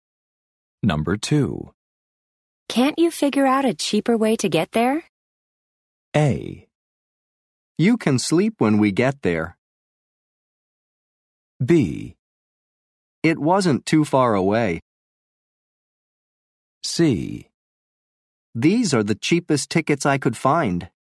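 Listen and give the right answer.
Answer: C: These are the cheapest tickets I could find.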